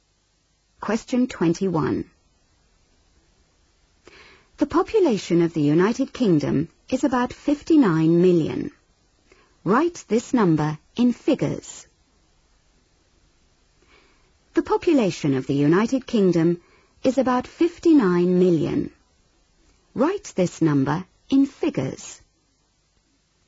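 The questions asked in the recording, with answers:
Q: Write this number in figures.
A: 59000000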